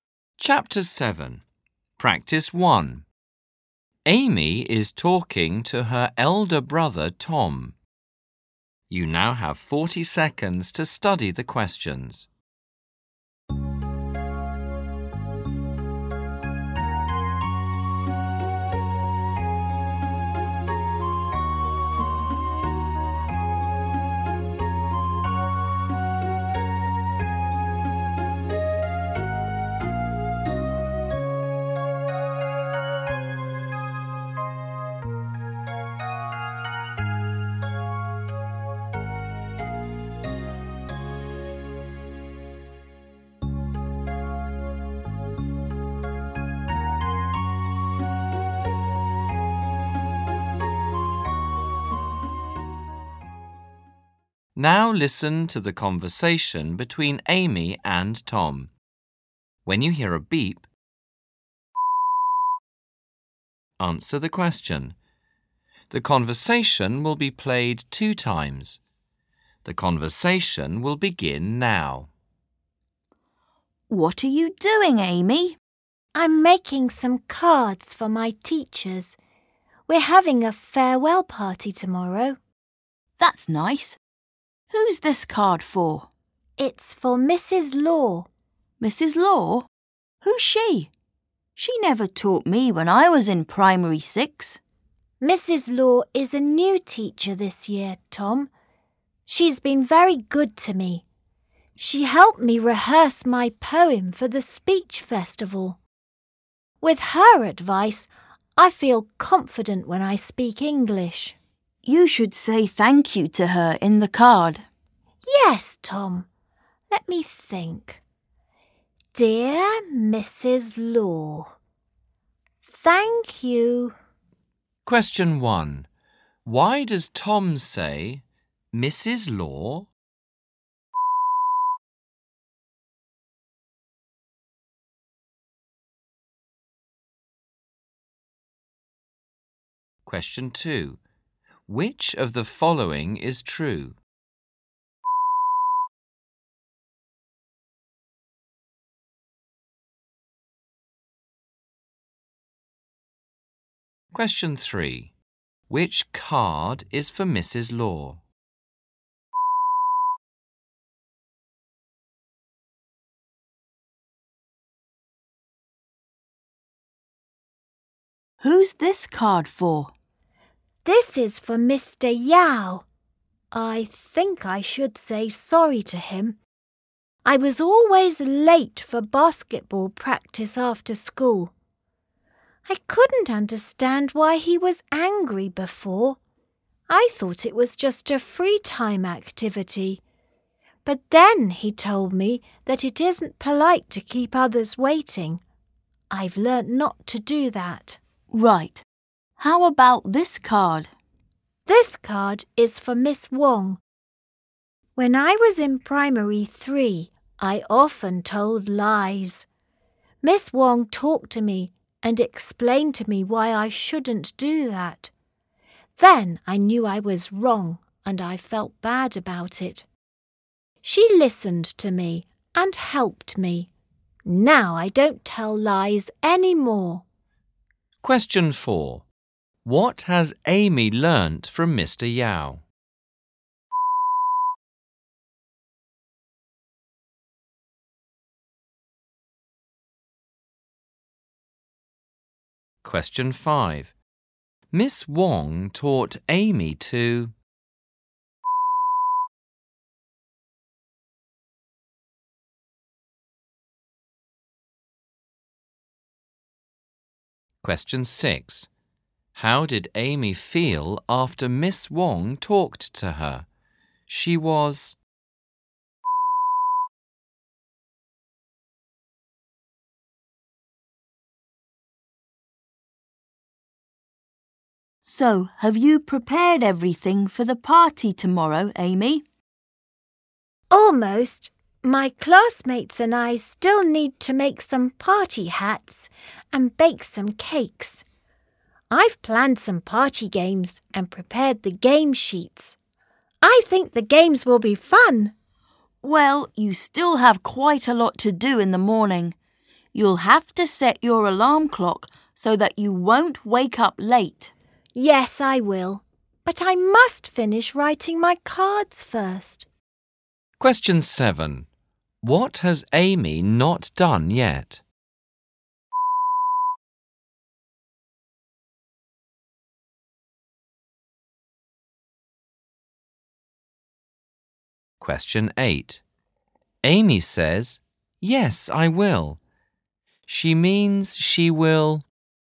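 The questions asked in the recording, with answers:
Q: Why does Tom say, Mrs. Law?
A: He doesn't know who she is; she never taught him

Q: What has Amy learnt from Mr. Yao?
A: Not to be late / keep others waiting

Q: Miss Wong taught Amy to...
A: not tell lies

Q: How did Amy feel after Miss Wong talked to her? She was...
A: bad

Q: What has Amy not done yet?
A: Make party hats and bake cakes

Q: Amy says, "Yes, I will." She means she will.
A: set her alarm clock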